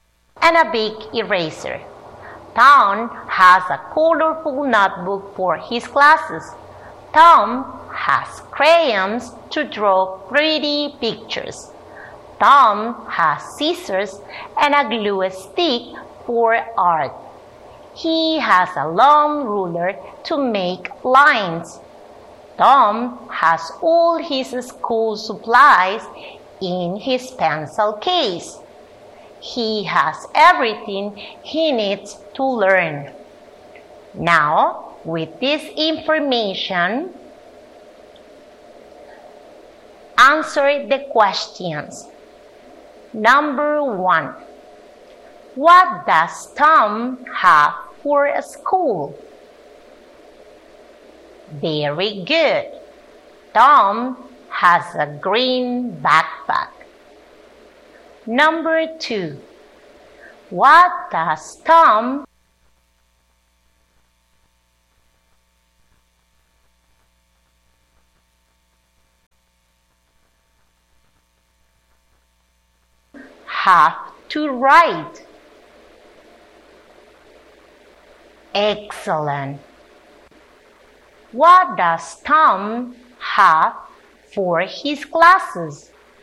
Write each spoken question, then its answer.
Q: What does Tom have for his classes?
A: Excellent. He has a colorful notebook.